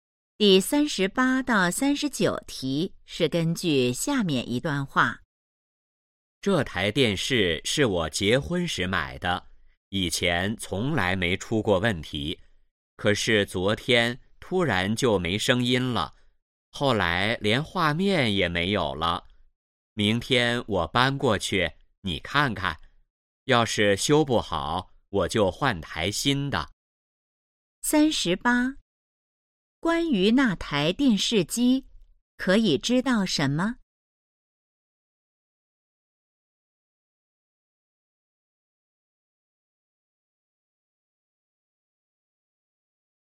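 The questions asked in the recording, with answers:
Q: 关于那台电视机,可以知道什么?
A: 是结婚时买的,突然没声音、没画面了

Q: 说话人打算怎么做?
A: 先修,修不好就换台新的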